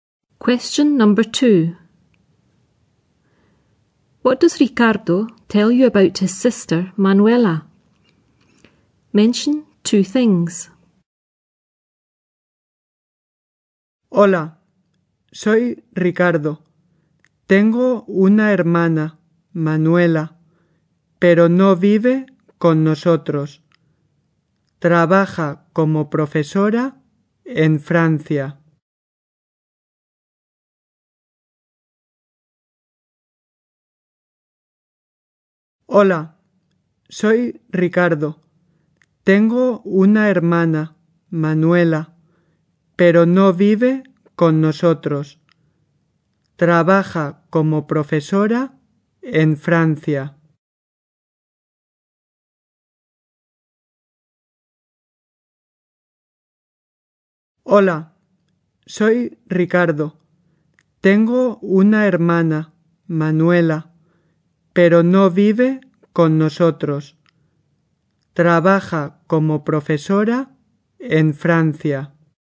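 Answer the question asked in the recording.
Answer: She doesn't live with them; she works as a teacher in France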